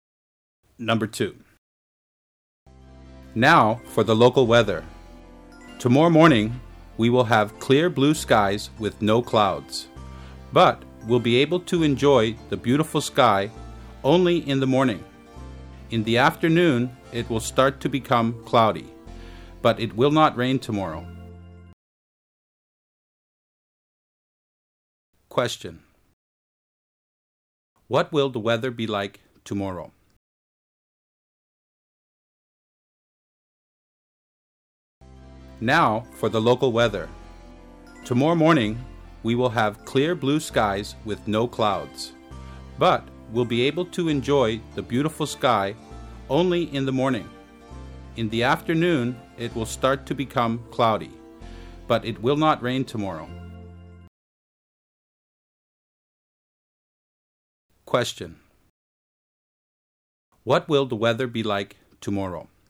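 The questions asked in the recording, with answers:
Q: What will the weather be like tomorrow?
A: Sunny in the morning, cloudy in the afternoon, no rain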